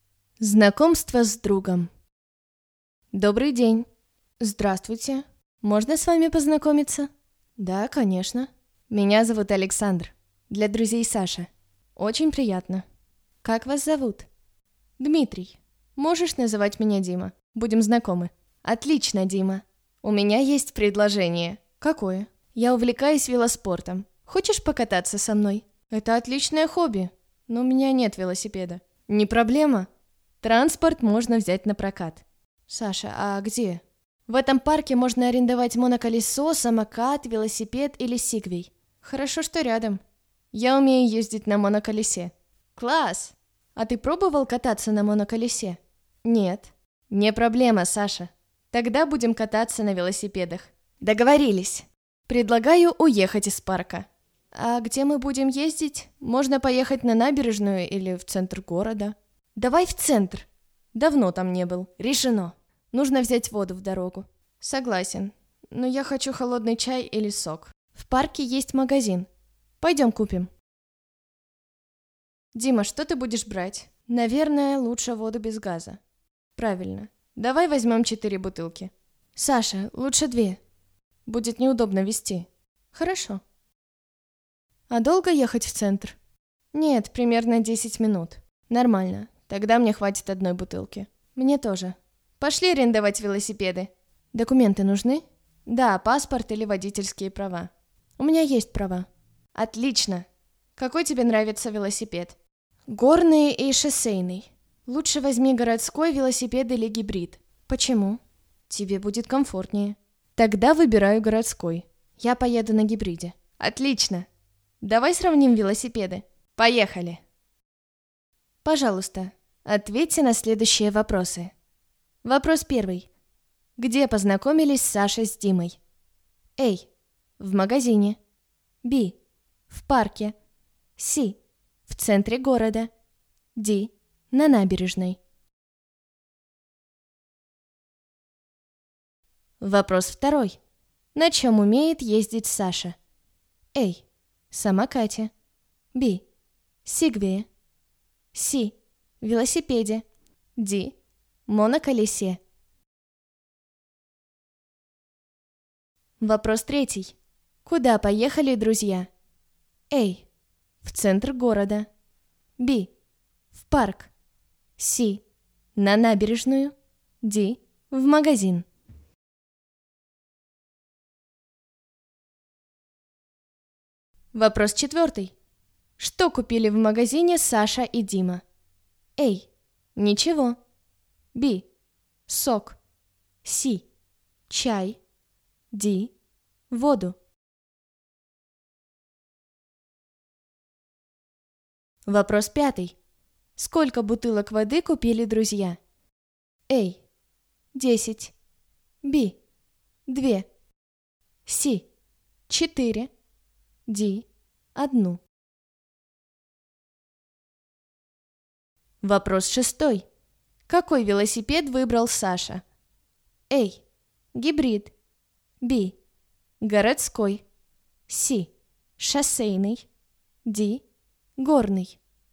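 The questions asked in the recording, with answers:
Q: Где познакомились Саша с Димой?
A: B: В парке.

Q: Куда поехали друзья?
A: A: В центр города.

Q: Что купили в магазине Саша и Дима?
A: D: Воду.

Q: Сколько бутылок воды купили друзья?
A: B: 2.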